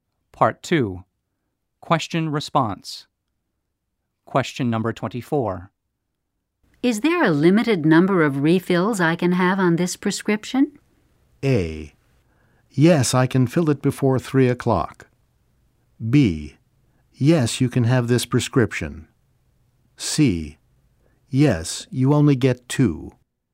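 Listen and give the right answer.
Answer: C: Yes, you only get 2.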